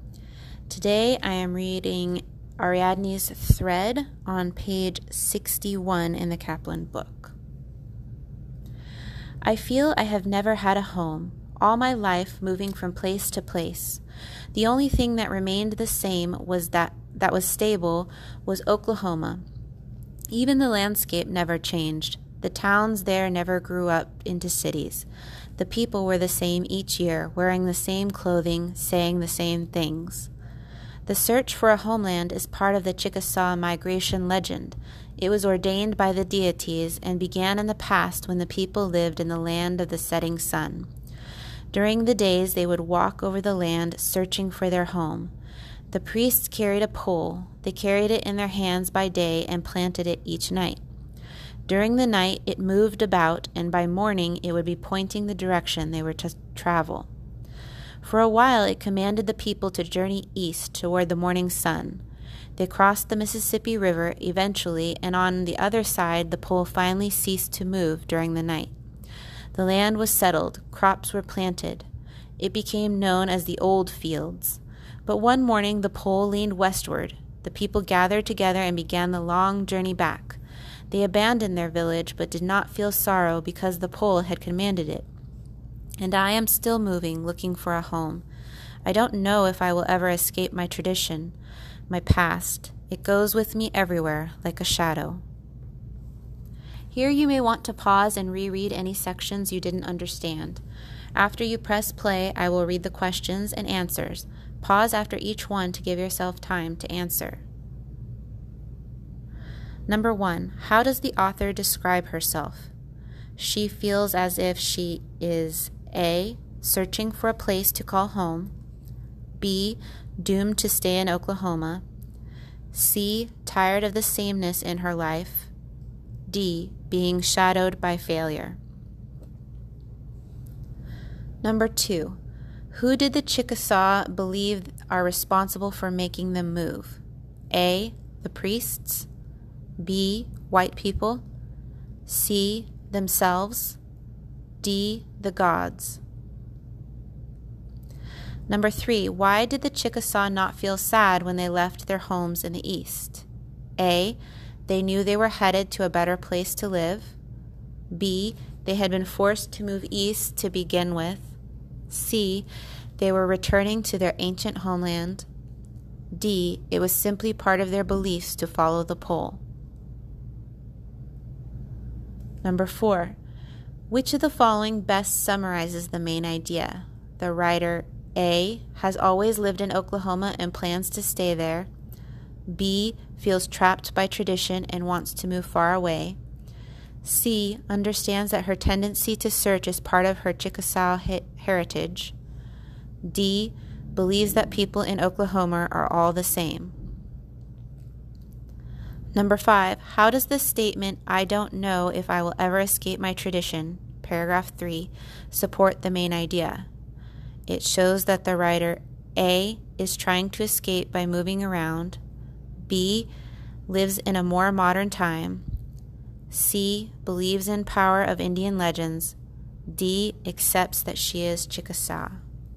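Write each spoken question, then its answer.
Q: How does the author describe herself?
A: A: searching for a place to call home.

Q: Who did the Chickasaw believe are responsible for making them move?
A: D: the gods.

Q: Why did the Chickasaw not feel sad when they left their homes in the east?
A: D: it was simply part of their beliefs to follow the pole.

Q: Which of the following best summarizes the main idea?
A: C: understands that her tendency to search is part of her Chickasaw heritage.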